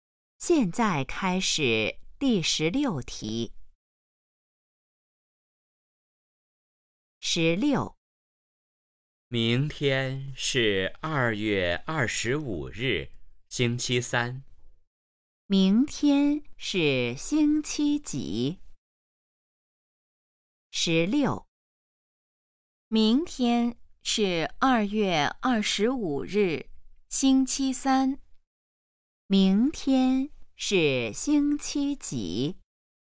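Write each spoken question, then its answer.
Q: 明天是星期几?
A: 星期三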